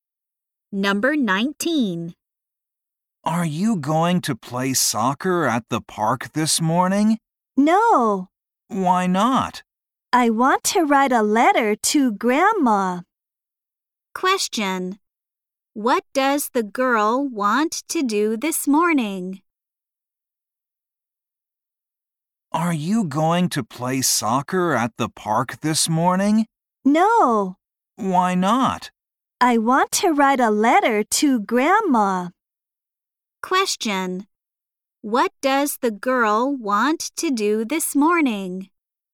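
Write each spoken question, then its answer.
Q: What does the girl want to do this morning?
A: Write a letter to her grandma.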